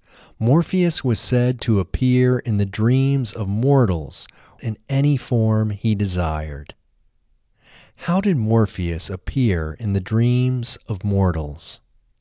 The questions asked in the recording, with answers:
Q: How did Morpheus appear in the dreams of mortals?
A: Morpheus appeared in the dreams of mortals in any form he desired.